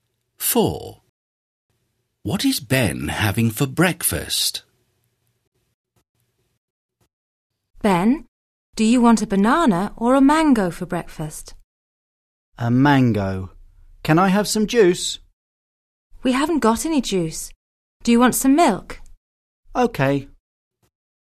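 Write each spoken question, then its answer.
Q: What is Ben having for breakfast?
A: A mango and some milk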